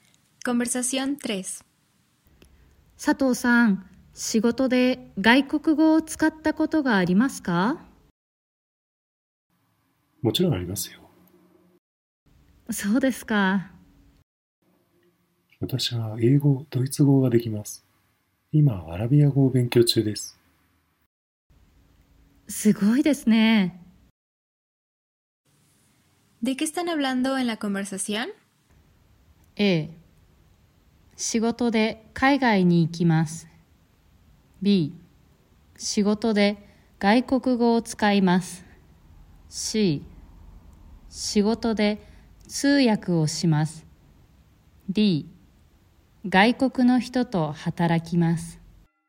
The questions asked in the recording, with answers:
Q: ¿De qué están hablando en la conversación?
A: La respuesta correcta es la B, ya que están hablando sobre utilizar un idioma extranjero en el trabajo.